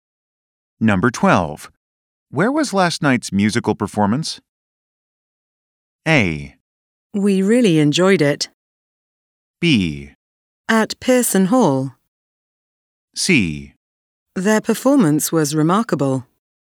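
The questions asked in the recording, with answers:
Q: Where was last night's musical performance?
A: B: At Pearson Hall.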